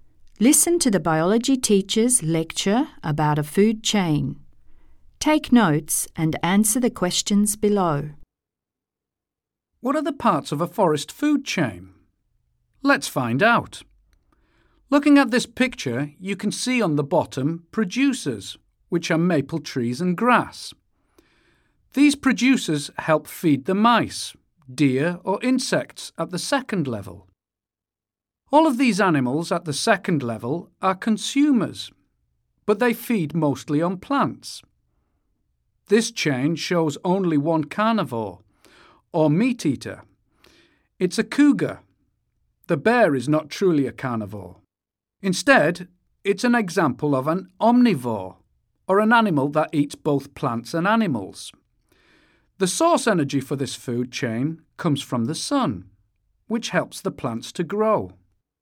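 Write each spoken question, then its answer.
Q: What are the parts of a forest food chain?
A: Producers (maple trees, grass), plant-eating consumers (mice, deer, insects), a carnivore (cougar), an omnivore (bear), with the sun as the energy source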